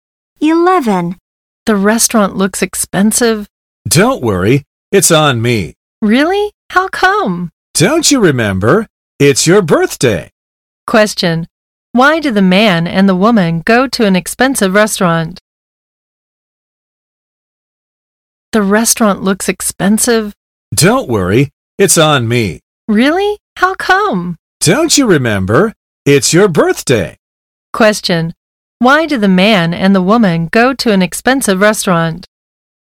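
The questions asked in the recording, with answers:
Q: Why do the man and the woman go to an expensive restaurant?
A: To celebrate a birthday; it's one of them's birthday and the other is paying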